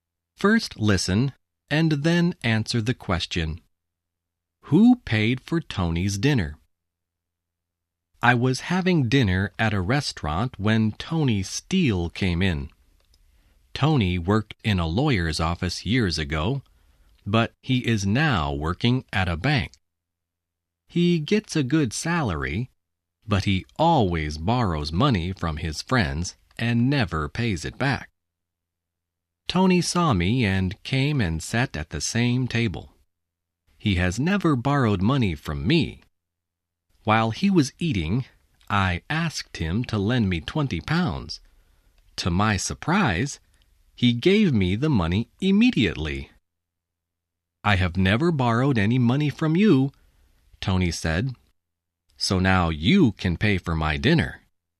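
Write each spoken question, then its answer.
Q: Who paid for Tony's dinner?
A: The narrator (the writer) paid for it.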